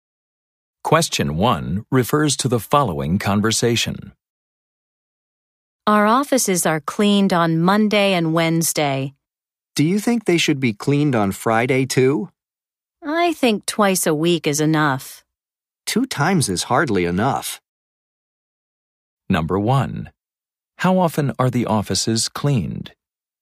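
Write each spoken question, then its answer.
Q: How often are the offices cleaned?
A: Twice a week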